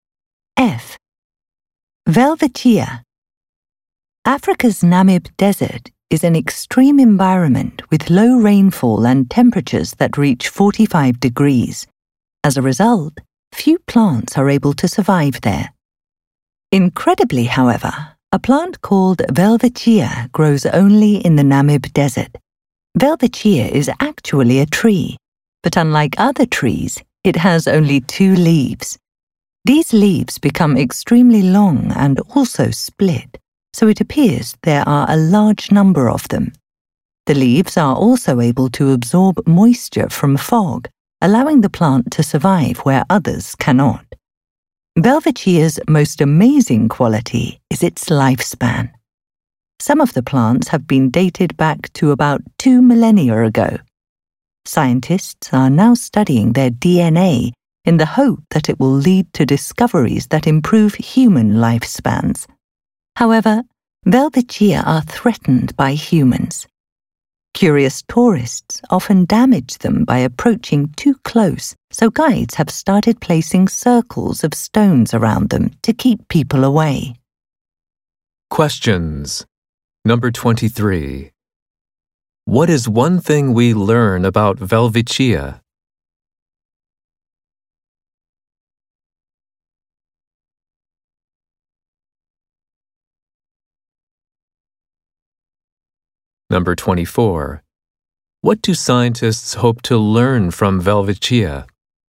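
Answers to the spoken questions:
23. It can live for about two thousand years
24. How to improve human lifespans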